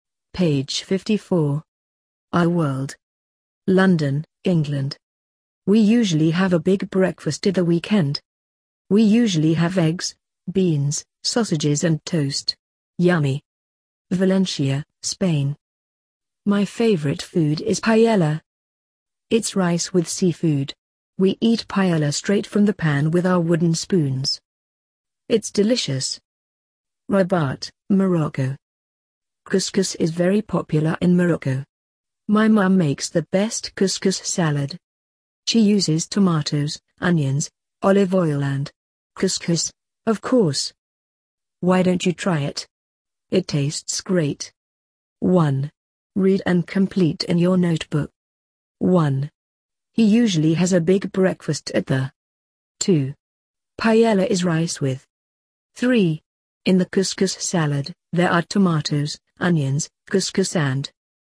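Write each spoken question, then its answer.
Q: He usually has a big breakfast at the.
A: weekend

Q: Paella is rice with.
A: seafood

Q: In the couscous salad, there are tomatoes, onions, couscous and.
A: olive oil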